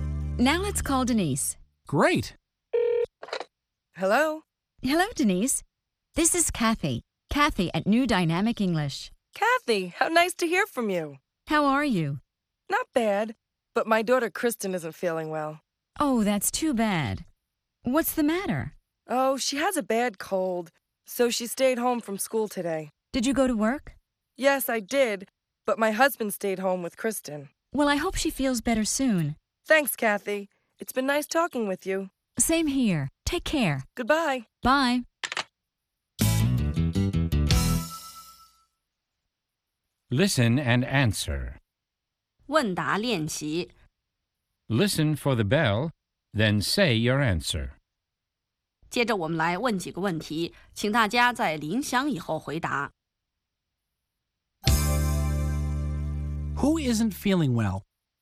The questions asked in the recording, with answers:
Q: Who isn't feeling well?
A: Denise's daughter Kristen isn't feeling well.